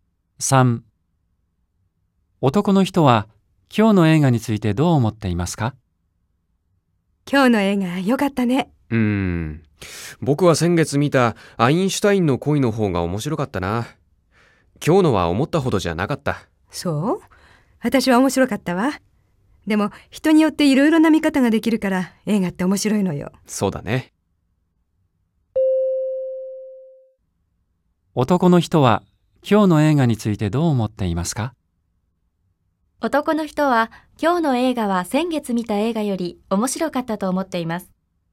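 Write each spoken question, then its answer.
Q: 男の人は今日の映画についてどう思っていますか? 男の人は今日の映画は先月見た映画より面白かったと思っています。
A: ×(先月の映画の方が面白かった)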